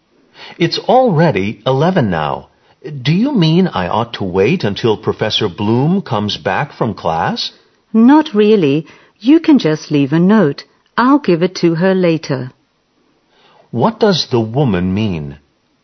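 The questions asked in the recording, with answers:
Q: What does the woman mean?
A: He doesn't need to wait; he can leave a note and she'll give it to Professor Bloom later.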